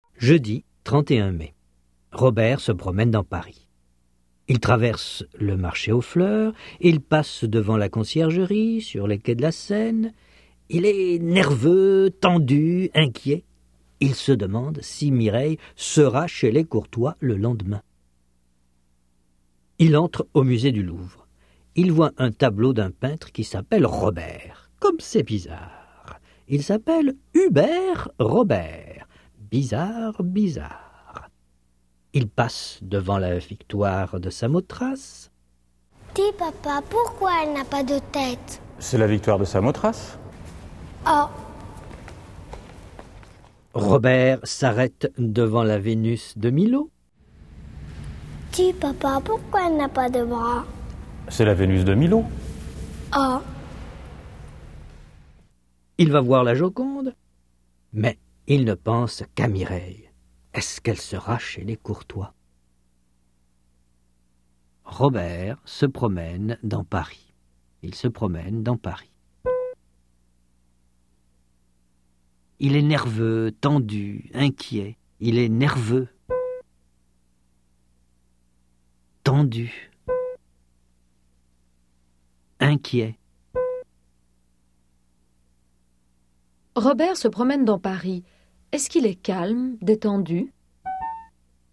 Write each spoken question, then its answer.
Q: Est-ce qu'il est calme, détendu?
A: Non, il est nerveux, tendu, inquiet.